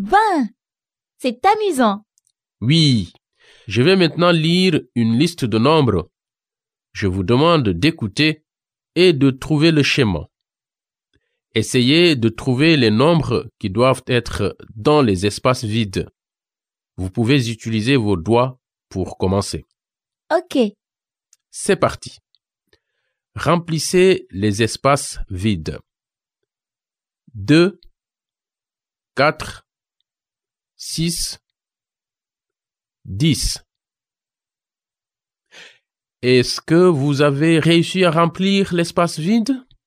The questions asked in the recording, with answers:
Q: Est-ce que vous avez réussi à remplir l'espace vide?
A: Le premier espace vide est 8.